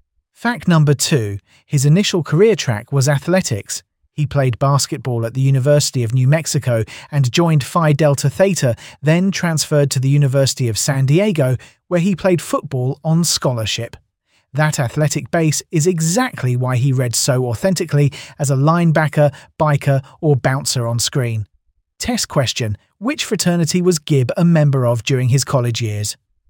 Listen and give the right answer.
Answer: Correct answer. Phi Delta Theta.